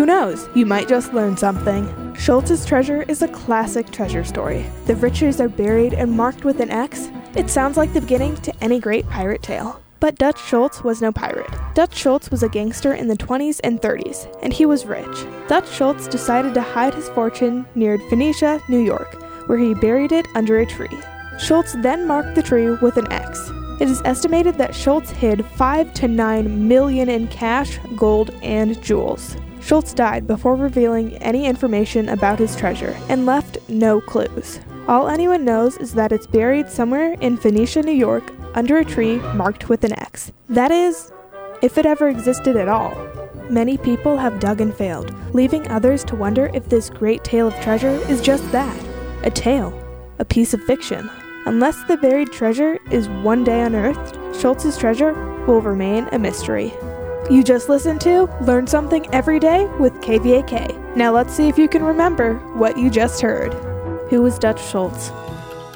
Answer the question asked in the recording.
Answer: Dutch Schultz was a gangster in the 20s and 30s who buried and hid his fortune.